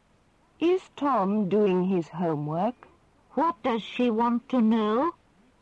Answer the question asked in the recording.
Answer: She wants to know if Tom is doing his homework.